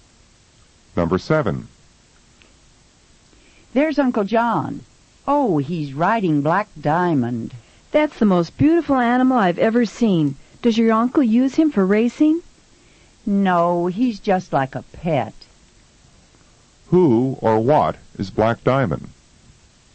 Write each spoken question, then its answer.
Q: Who or what is Black Diamond?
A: Uncle John is riding his horse.